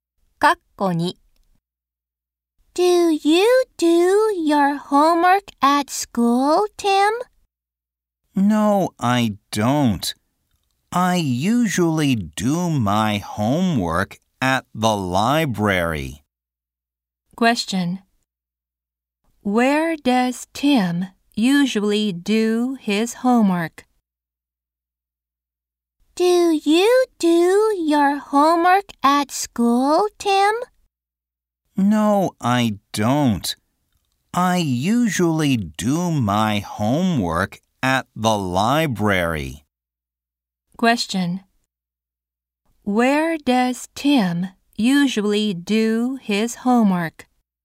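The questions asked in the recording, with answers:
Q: Where does Tim usually do his homework?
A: At the library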